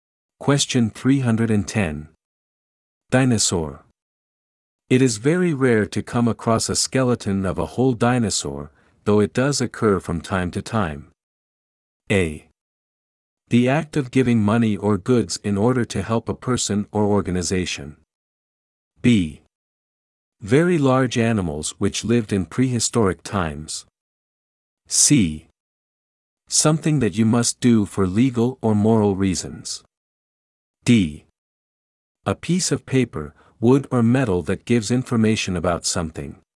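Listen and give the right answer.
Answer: B: Very large animals which lived in prehistoric times.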